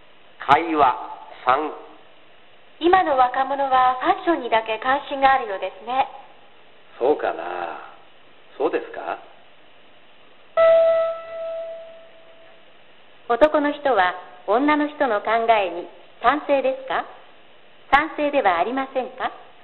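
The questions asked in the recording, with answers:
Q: 男の人は女の人の考えに賛成ですか賛成ではありませんか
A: 賛成ではありません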